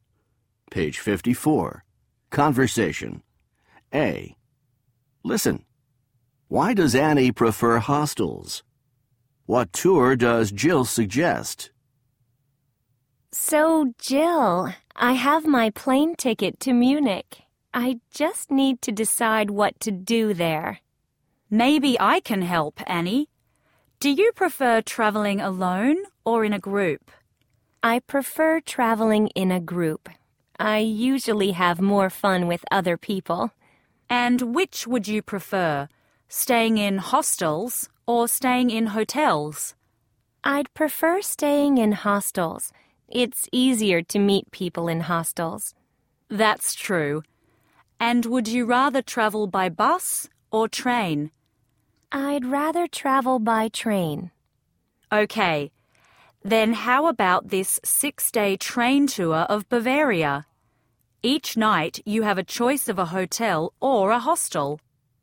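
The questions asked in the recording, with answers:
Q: Why does Annie prefer hostels?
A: It's easier to meet people in hostels.

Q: What tour does Jill suggest?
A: A 6-day train tour of Bavaria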